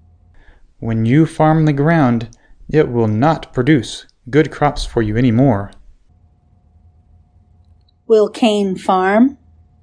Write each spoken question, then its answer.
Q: Will Cain farm?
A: Yes, Cain will farm.